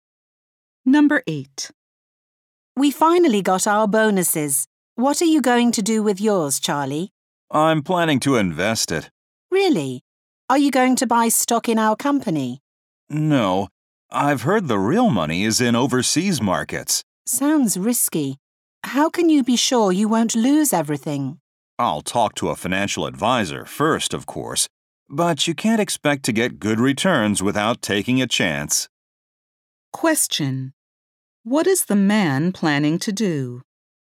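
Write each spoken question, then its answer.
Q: What is the man planning to do?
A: Invest his bonus in overseas markets.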